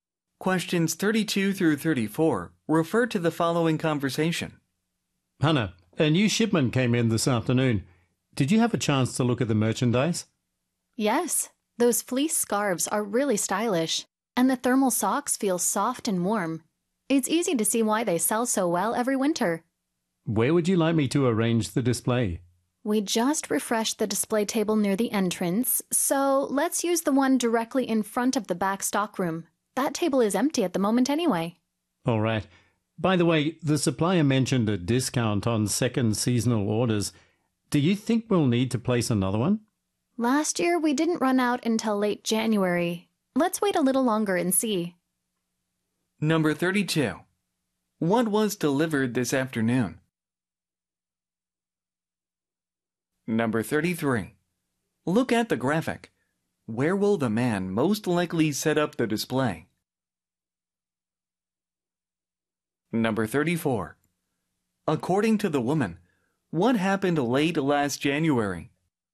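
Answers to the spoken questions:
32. Winter merchandise: fleece scarves and thermal socks
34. The store ran out of the items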